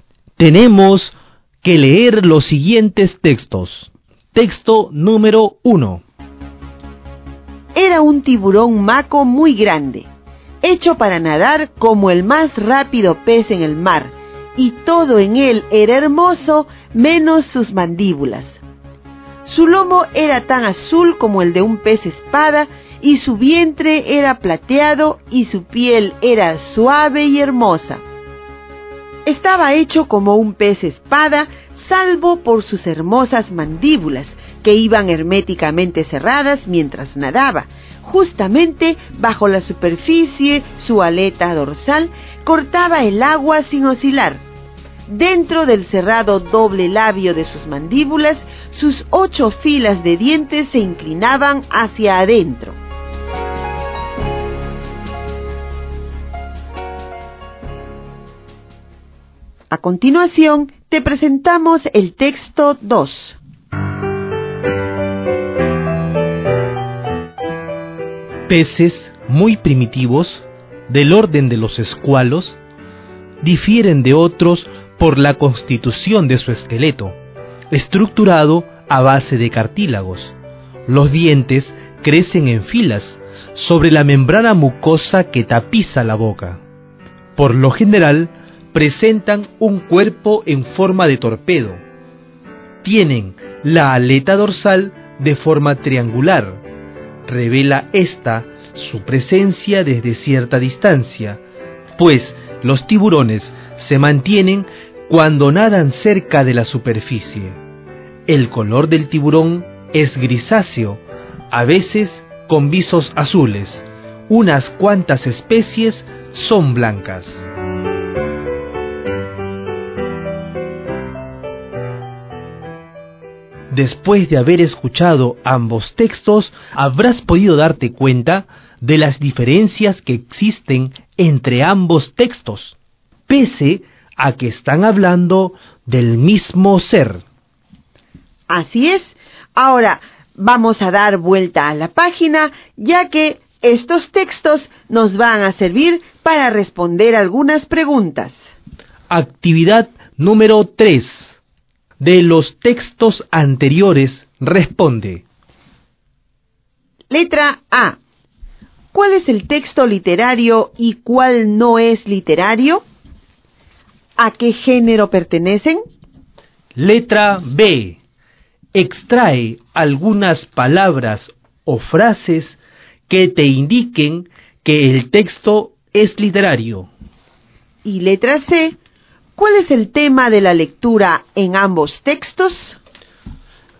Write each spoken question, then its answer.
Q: ¿Cuál es el texto literario y cuál no es literario?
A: Con esta explicación, ahora me doy cuenta que el texto número 1 es un texto literario.